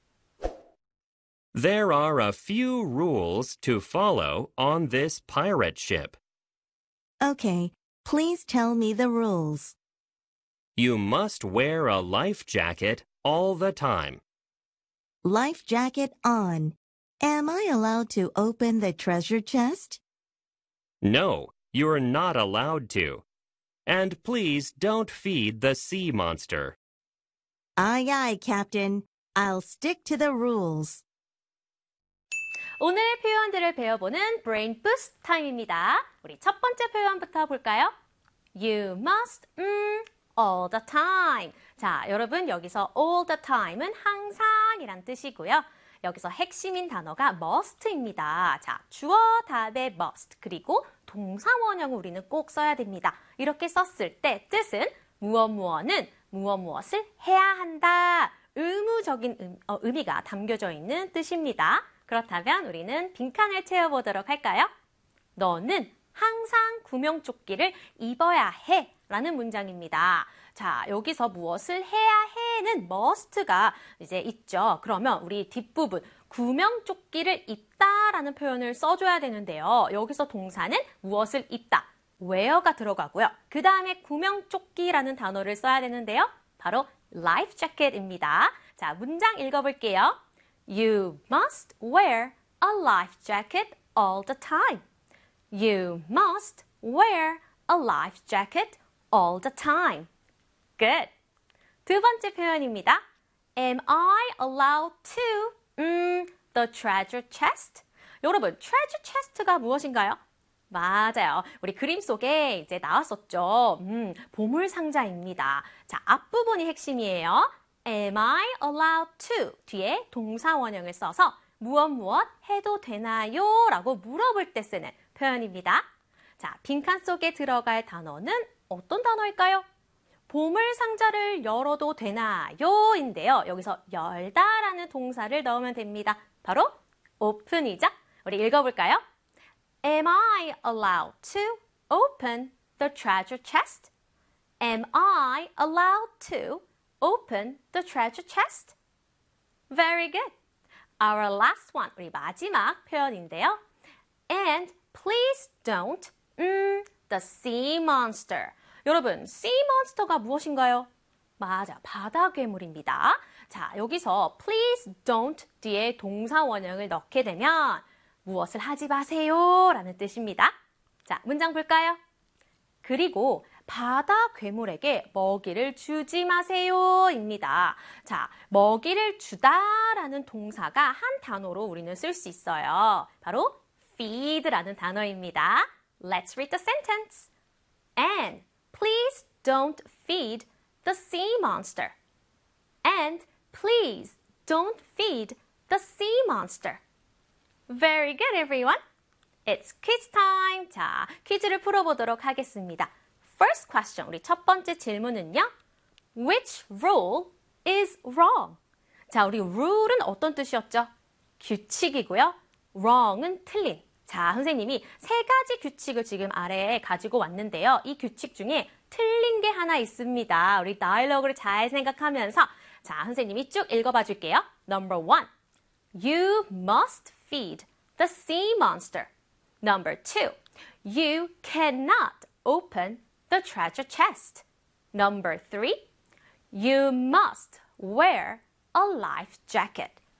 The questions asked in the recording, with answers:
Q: Which rule is wrong?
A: The answer is number one.